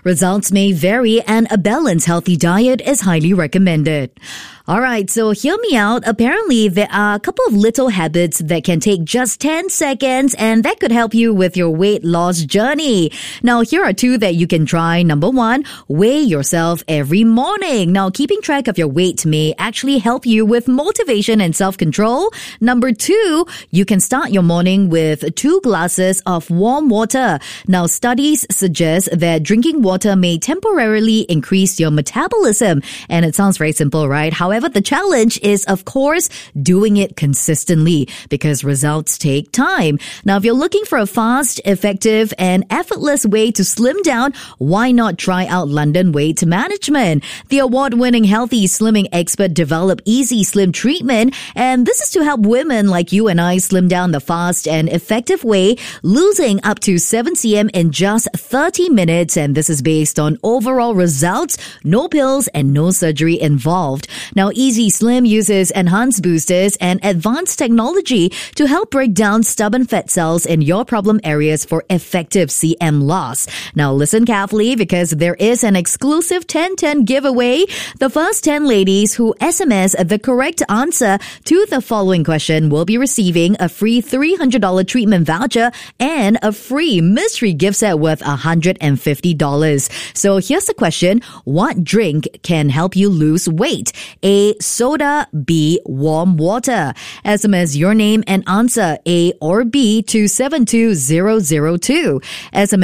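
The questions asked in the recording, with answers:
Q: What drink can help you lose weight?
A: B: Warm water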